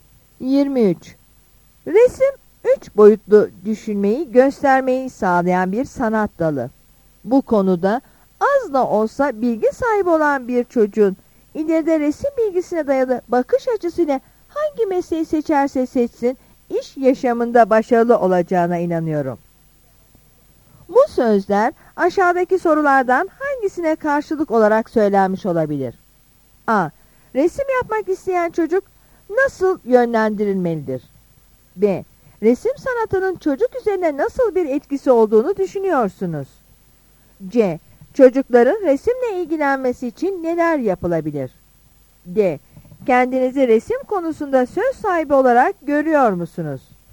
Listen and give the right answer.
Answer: Yanıt B'dir.